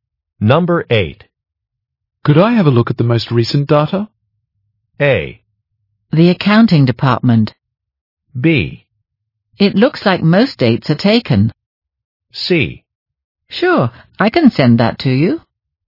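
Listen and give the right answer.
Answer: C: Sure, I can send that to you.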